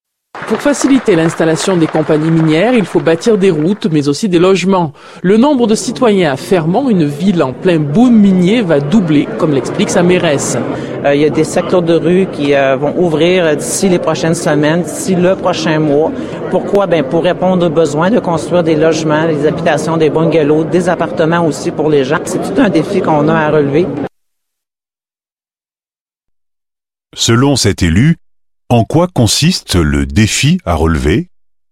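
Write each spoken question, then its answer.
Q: Selon cet élu, en quoi consiste le défi à relever?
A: Construire des logements (habitations, bungalows, appartements) pour une population qui va doubler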